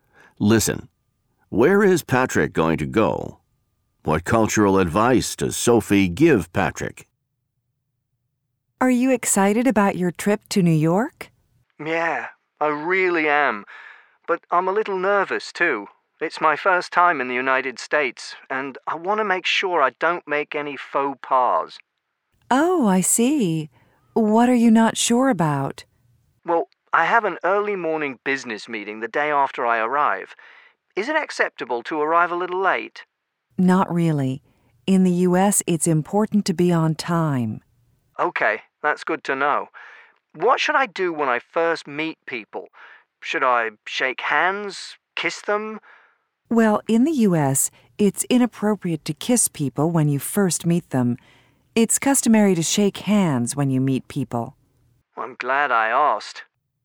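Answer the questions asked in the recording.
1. New York, in the United States
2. Be on time, and shake hands instead of kissing when you first meet people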